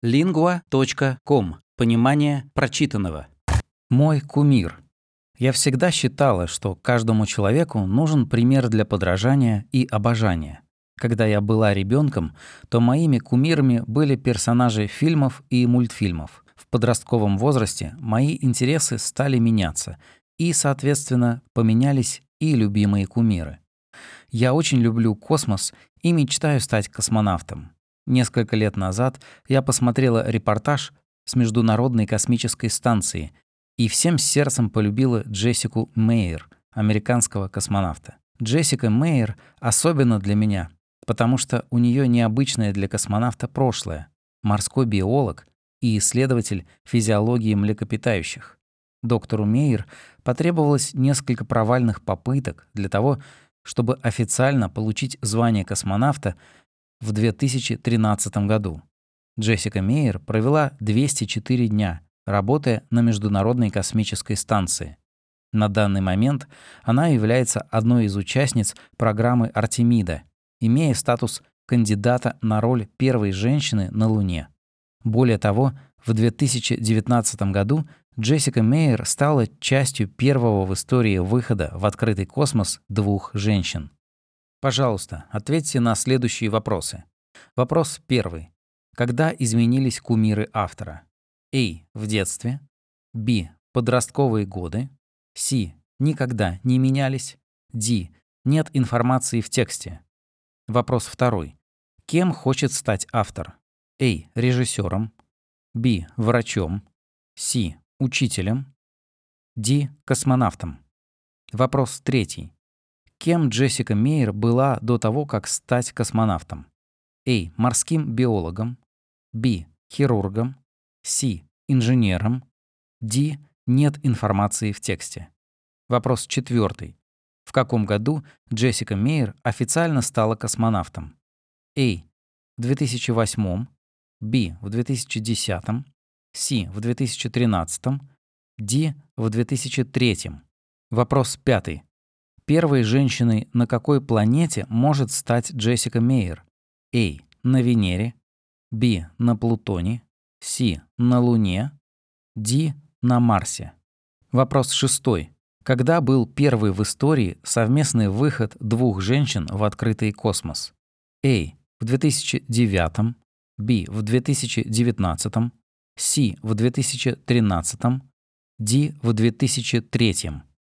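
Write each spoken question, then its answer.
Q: Когда изменились кумиры автора?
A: Б: Подростковые годы.

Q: Кем хочет стать автор?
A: Д: Космонавтом.

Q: Кем Джессика Мейер была до того, как стать космонавтом?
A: А: Морским биологом.

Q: В каком году Джессика Мейер официально стала космонавтом?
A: С: В 2013.

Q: Первой женщиной на какой планете может стать Джессика Мейер?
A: С: На Луне.

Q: Когда был первый в истории совместный выход двух женщин в открытый космос?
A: Б: В 2019.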